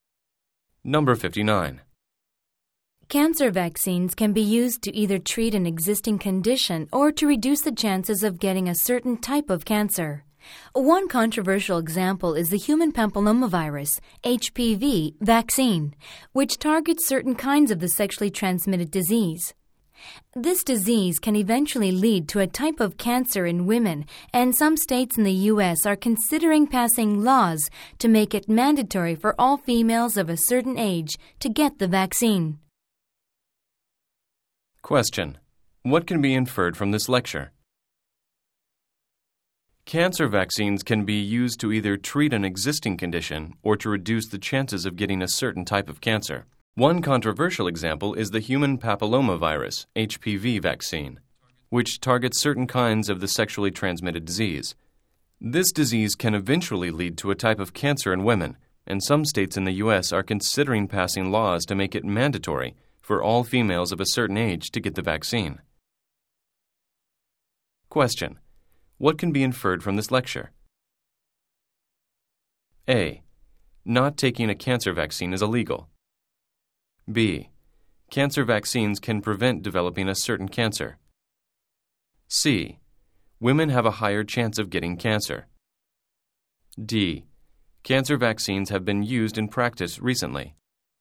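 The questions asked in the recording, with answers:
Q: what can be inferred from this lecture?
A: B: Cancer vaccines can prevent developing a certain cancer.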